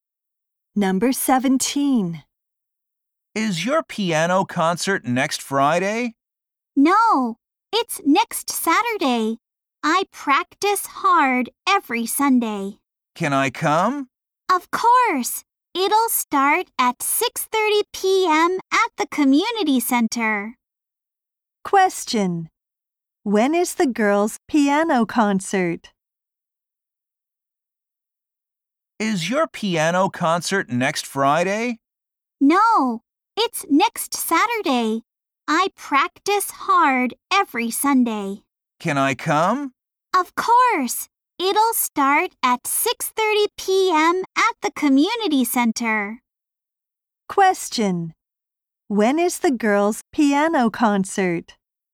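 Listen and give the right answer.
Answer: Next Saturday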